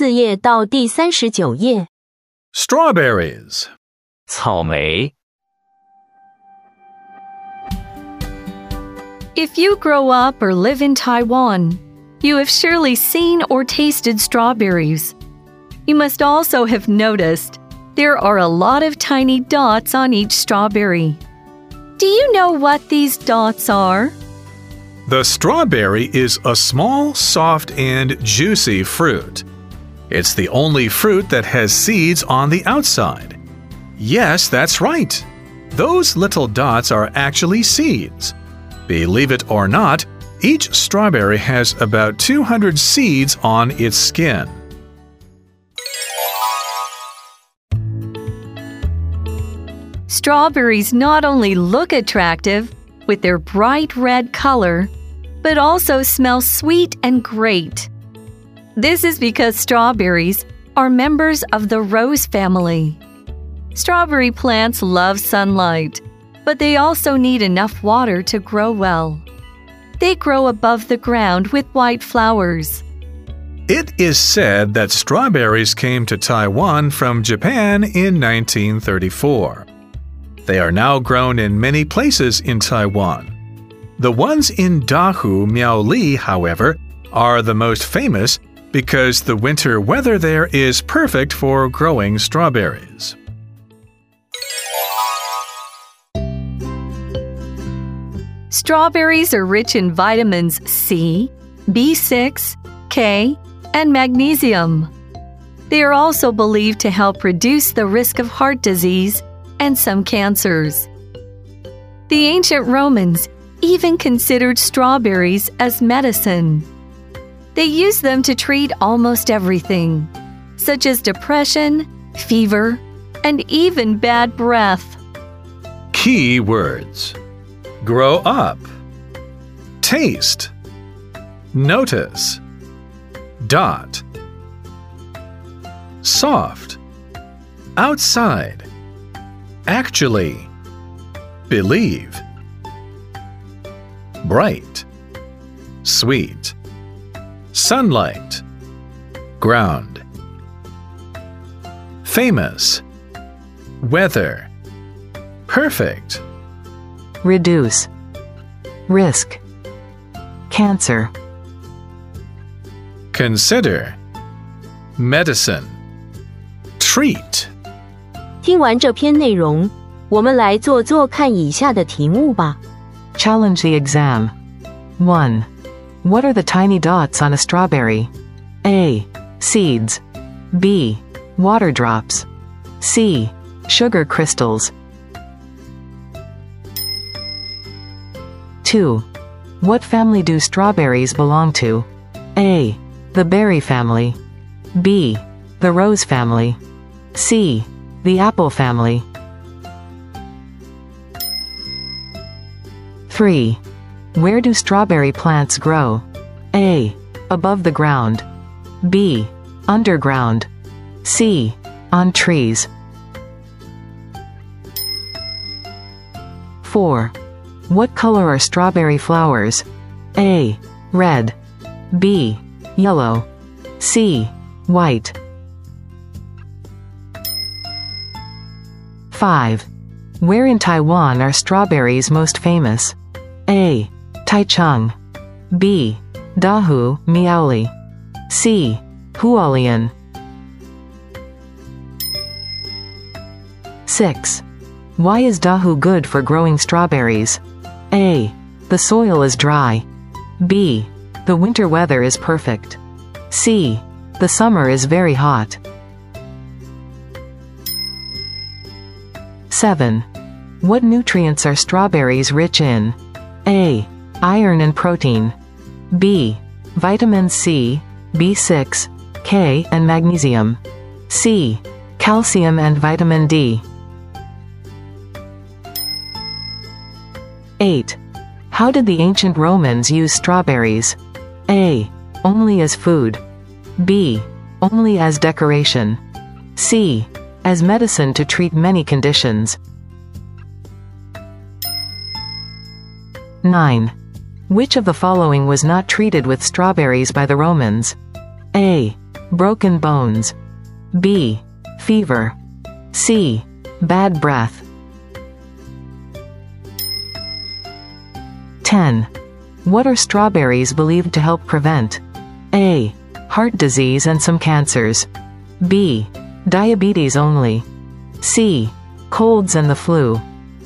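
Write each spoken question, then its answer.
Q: What are the tiny dots on a strawberry?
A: A: Seeds.

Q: What family do strawberries belong to?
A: B: The rose family.

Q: Where do strawberry plants grow?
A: A: Above the ground.

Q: What color are strawberry flowers?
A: C: White.

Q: Where in Taiwan are strawberries most famous?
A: B: Dahu, Miaoli.

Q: Why is Dahu good for growing strawberries?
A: B: The winter weather is perfect.

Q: What nutrients are strawberries rich in?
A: B: Vitamin C, B6, K, and magnesium.

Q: How did the ancient Romans use strawberries?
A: C: as medicine to treat many conditions.

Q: Which of the following was not treated with strawberries by the Romans?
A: A: Broken bones.

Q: What are strawberries believed to help prevent?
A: A: Heart disease and some cancers.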